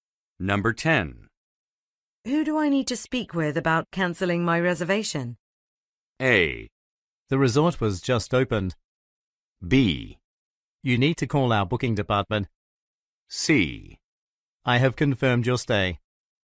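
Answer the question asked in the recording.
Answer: B: You need to call our booking department.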